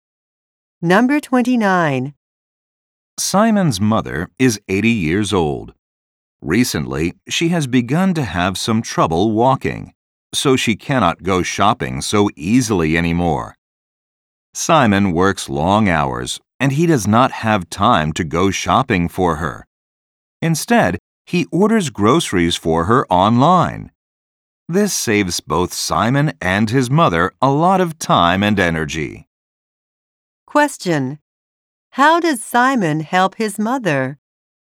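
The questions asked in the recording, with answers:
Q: How does Simon help his mother?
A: He orders groceries for her online.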